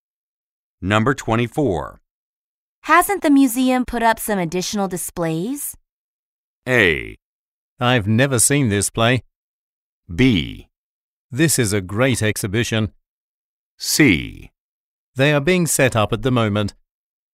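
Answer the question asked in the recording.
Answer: C: They are being set up at the moment.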